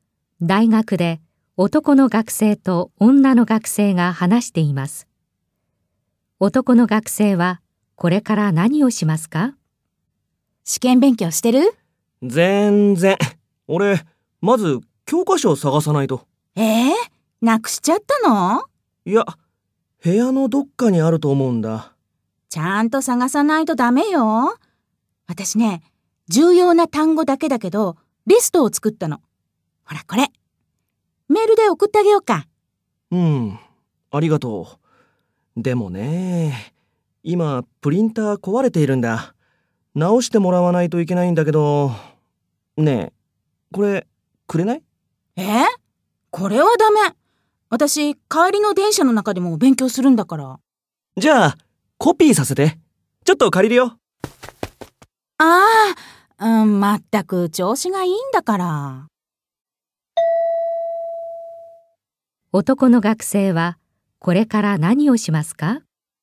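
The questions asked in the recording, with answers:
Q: 男の学生はこれから何をしますか?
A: 女の学生の単語リストをコピーする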